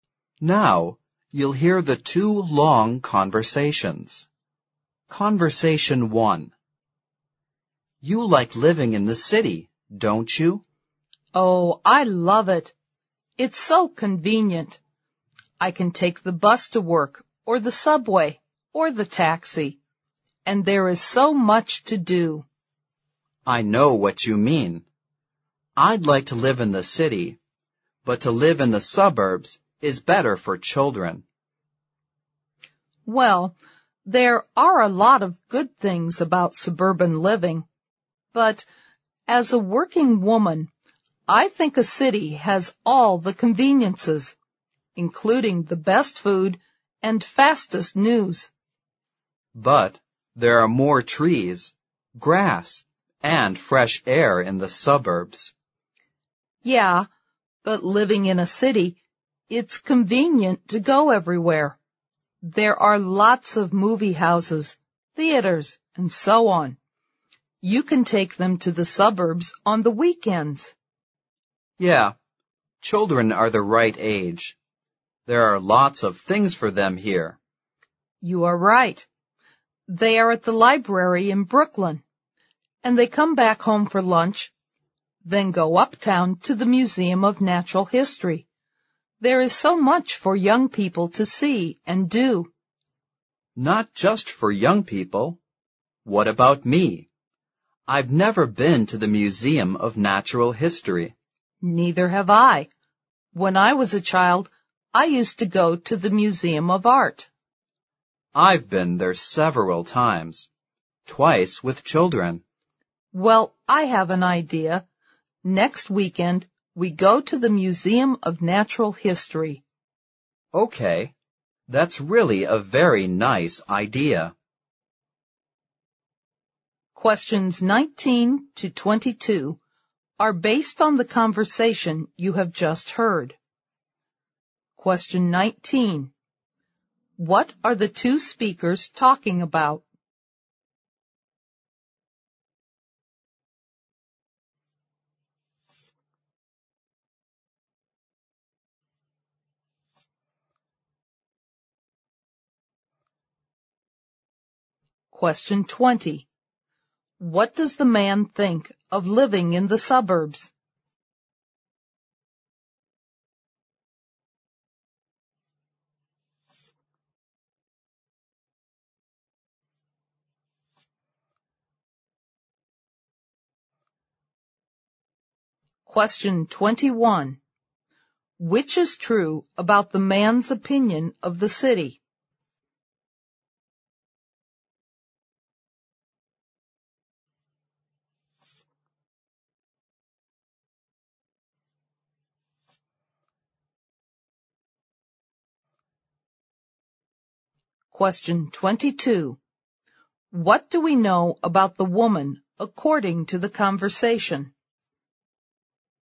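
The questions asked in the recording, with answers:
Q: What are the two speakers talking about?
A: Living in the city versus living in the suburbs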